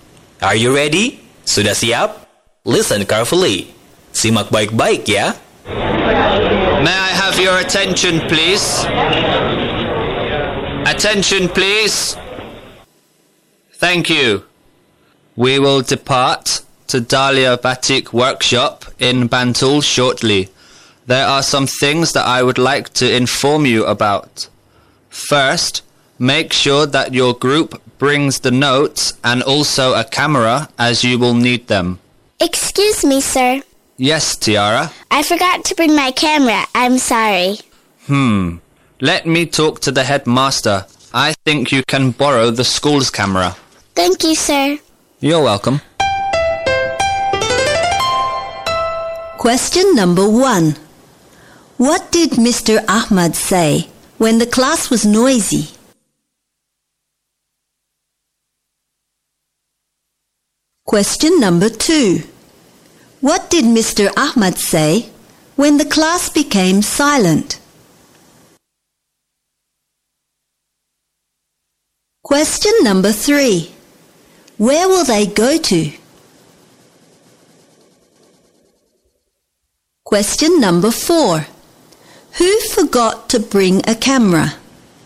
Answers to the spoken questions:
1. May I have your attention, please?
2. Thank you.
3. Dahlia Batik Workshop.
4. Tiara?